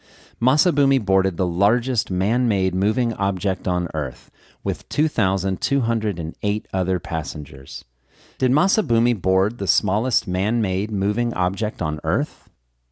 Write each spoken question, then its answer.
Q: Did Masabumi board the smallest man-made moving object on Earth?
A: No, Masabumi didn't board the smallest man-made moving object on Earth.